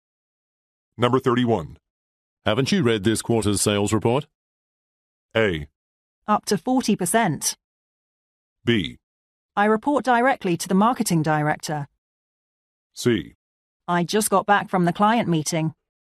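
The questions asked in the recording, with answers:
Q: Haven't you read this quarter's sales report?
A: C: I just got back from the client meeting.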